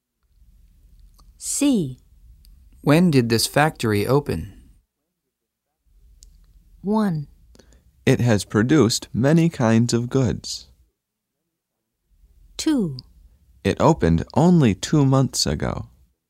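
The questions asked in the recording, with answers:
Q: When did this factory open?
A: 2: It opened only 2 months ago.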